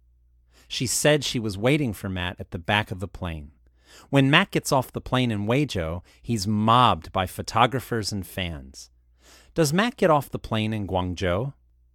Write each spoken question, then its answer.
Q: Does Matt get off the plane in Guangzhou?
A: No, he gets off the plane in Weizhou.